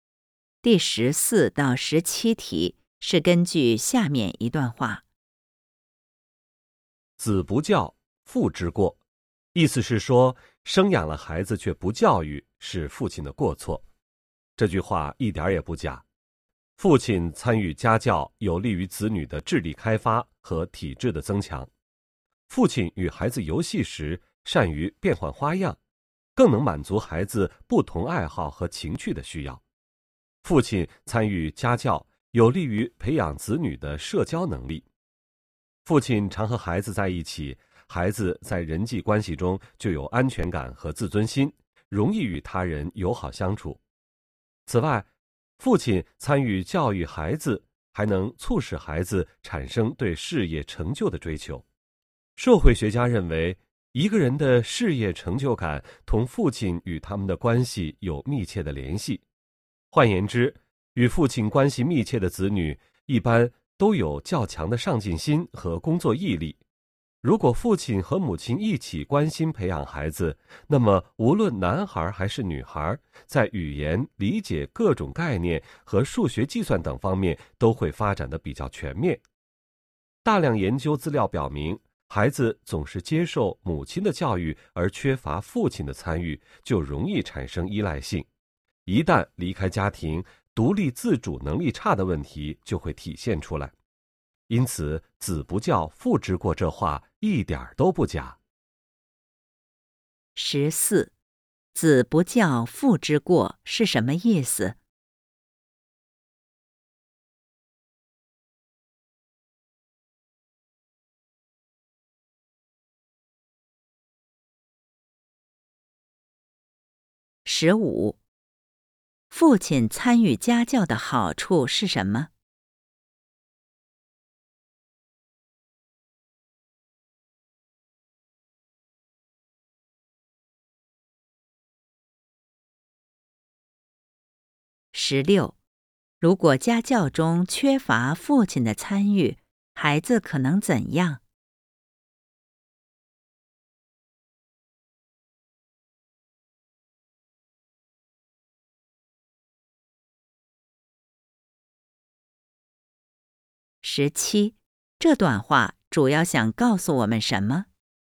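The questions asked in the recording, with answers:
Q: 十四,子不教,父之过是什么意思?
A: 生养了孩子却不教育是父亲的过错

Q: 十六,如果家教中缺乏父亲的参与,孩子可能怎样?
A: 容易产生依赖性,独立自主能力差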